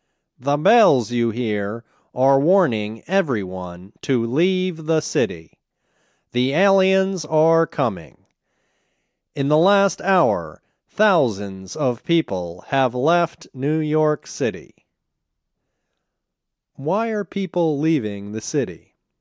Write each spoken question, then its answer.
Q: Why are people leaving the city?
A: They are leaving the city because the aliens are coming.